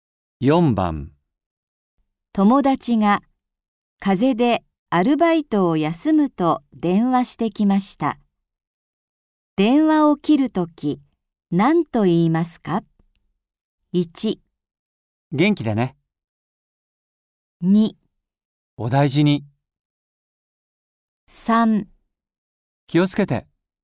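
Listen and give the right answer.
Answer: 2: お大事に。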